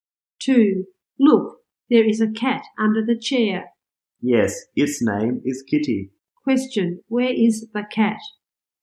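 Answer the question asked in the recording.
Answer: Under the chair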